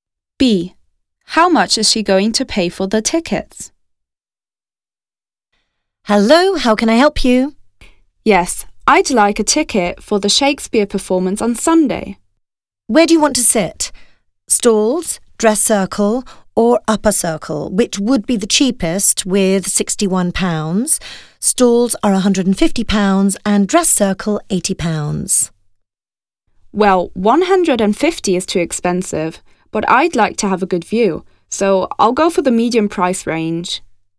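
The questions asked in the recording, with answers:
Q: How much is she going to pay for the tickets?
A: £80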